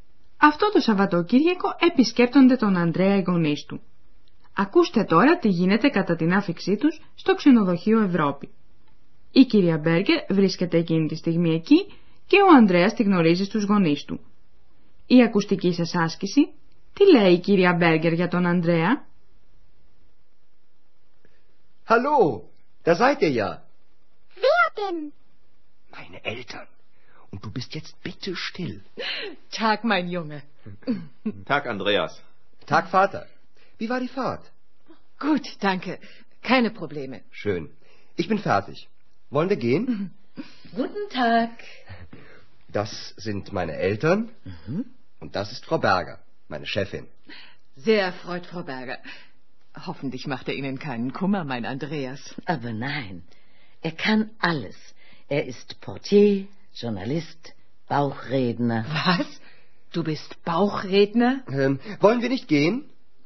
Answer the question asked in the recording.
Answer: Ίσως να καταλάβατε πως η κυρία Μπέρκερ επενεί τον Ανδρέα.